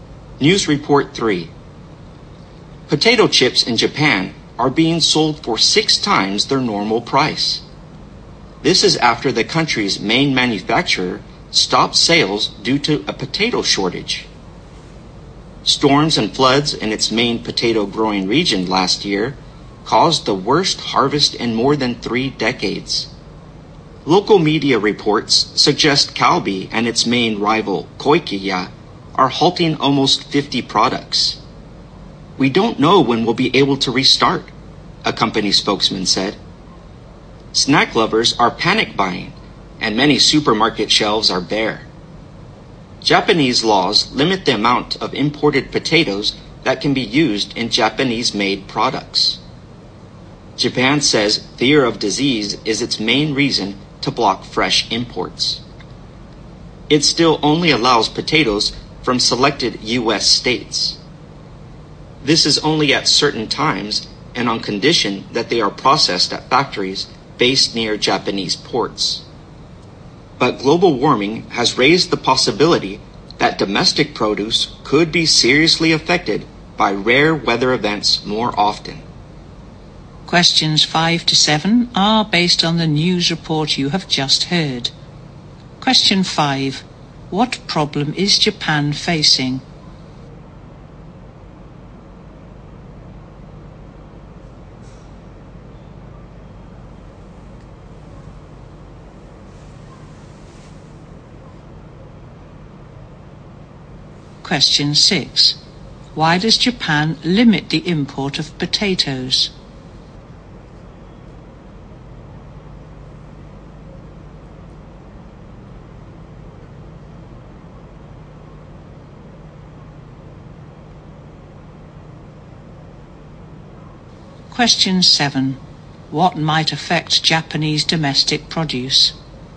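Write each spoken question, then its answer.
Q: What problem is Japan facing?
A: A potato shortage

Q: Why does Japan limit the import of potatoes?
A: Fear of disease

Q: What might affect Japanese domestic produce?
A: Rare weather events caused by global warming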